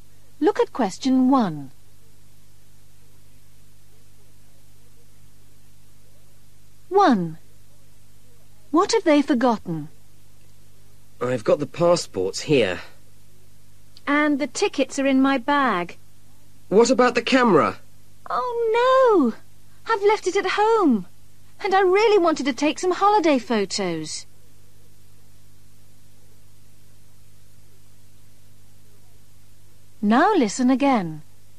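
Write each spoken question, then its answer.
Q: What have they forgotten?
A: The camera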